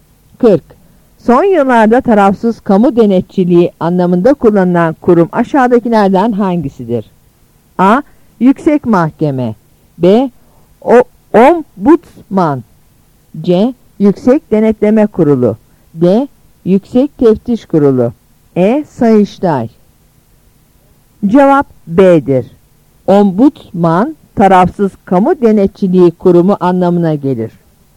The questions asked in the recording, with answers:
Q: Son yıllarda tarafsız kamu denetçiliği anlamında kullanılan kurum aşağıdakilerden hangisidir?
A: Cevap B'dir.